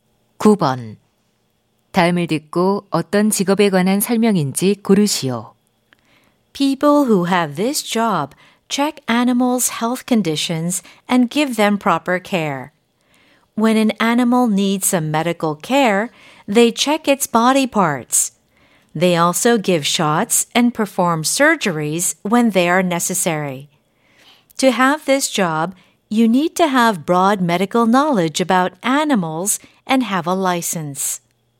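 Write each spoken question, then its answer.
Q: 다음을 듣고 어떤 직업에 관한 설명인지 고르시오.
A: 수의사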